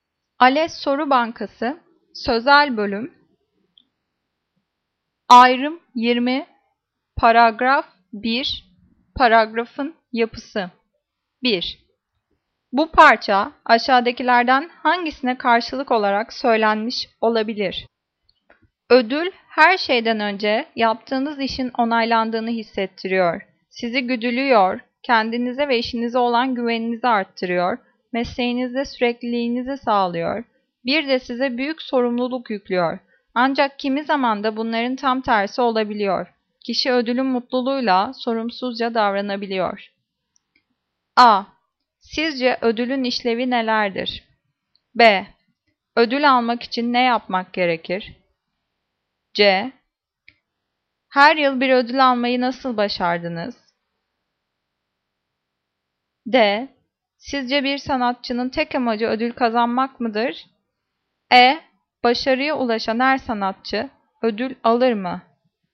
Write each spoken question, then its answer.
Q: Bu parça aşağıdakilerden hangisine karşılık olarak söylenmiş olabilir?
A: Cevap A. Sizce ödülün işlevi nelerdir?